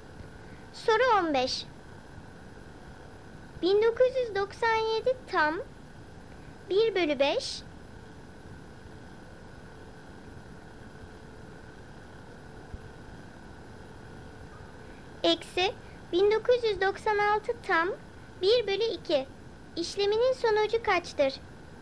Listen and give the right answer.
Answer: Doğru cevap 7 bölü 10 çıkıyor.